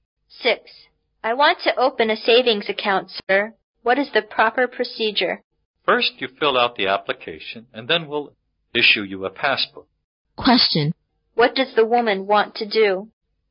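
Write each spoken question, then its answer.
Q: What does the woman want to do?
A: Open a savings account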